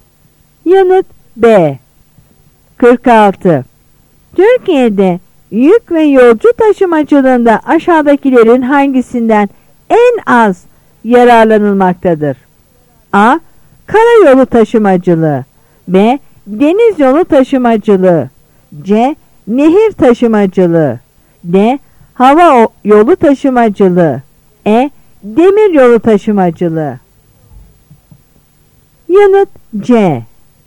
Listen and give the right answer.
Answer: Yanıt C.